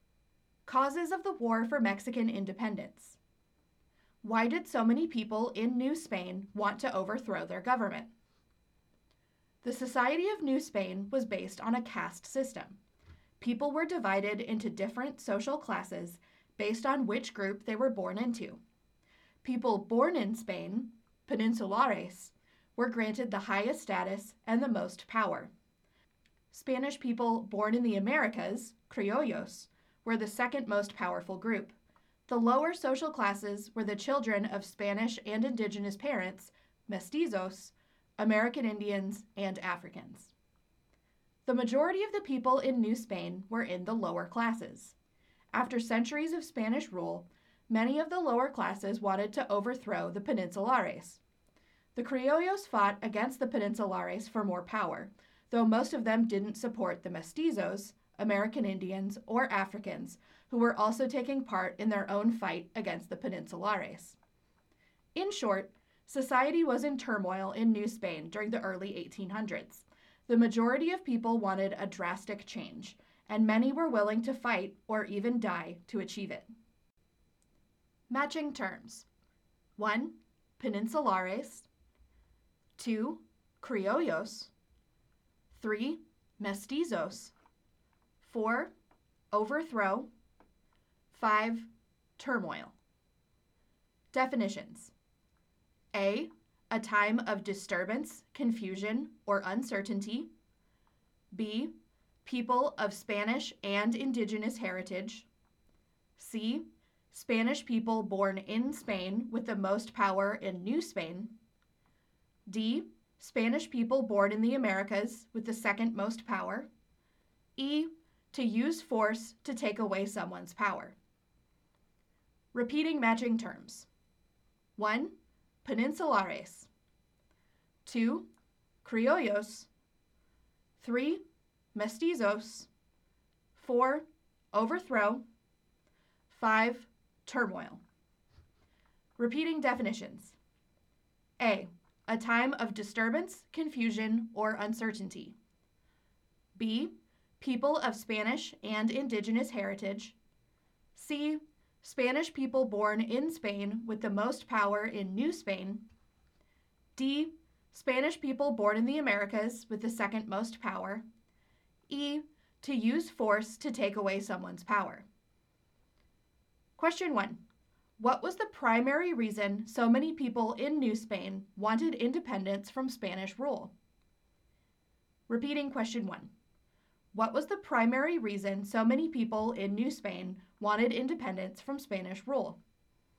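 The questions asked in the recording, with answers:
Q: What was the primary reason so many people in New Spain wanted independence from Spanish rule?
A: Anger at the caste system, which gave the lower classes few rights and kept the peninsulares in power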